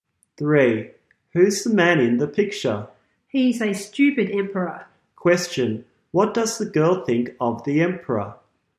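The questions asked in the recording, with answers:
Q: Question, what does the girl think of the emperor?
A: He's stupid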